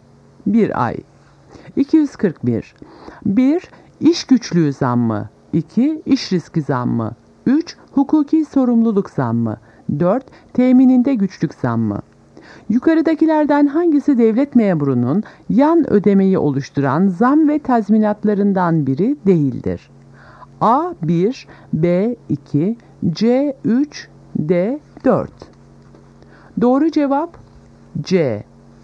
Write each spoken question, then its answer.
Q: Yukarıdakilerden hangisi devlet memurunun yan ödemeyi oluşturan zam ve tazminatlarından biri değildir?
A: Doğru cevap C. 3.